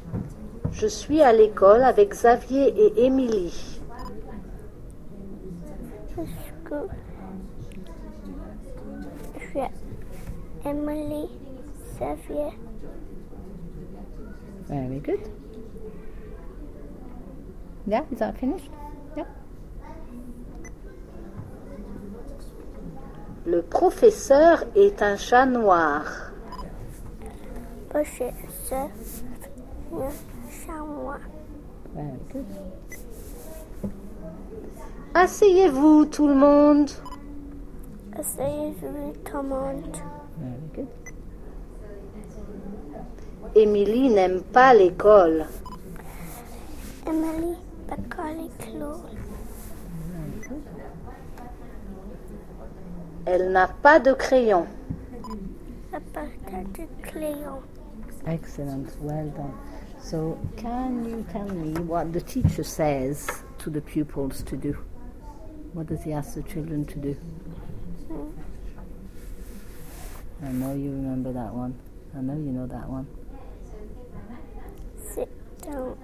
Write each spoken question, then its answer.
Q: So, can you tell me what the teacher says to the pupils to do?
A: Sit down.